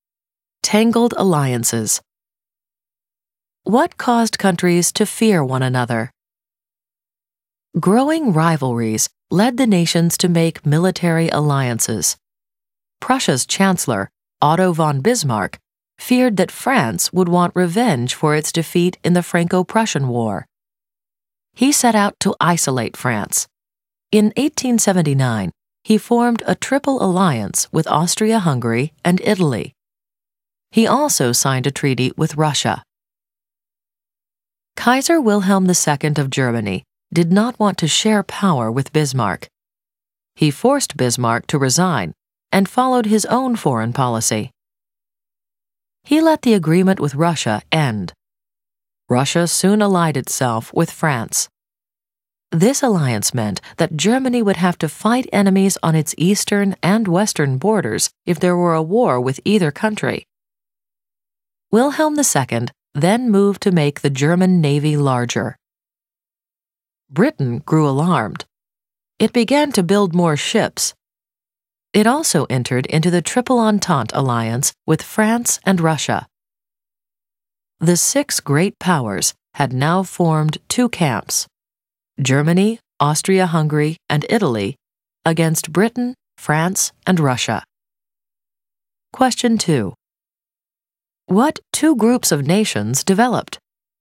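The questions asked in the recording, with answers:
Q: What two groups of nations developed?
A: Germany, Austria-Hungary and Italy (Triple Alliance) against Britain, France and Russia (Triple Entente)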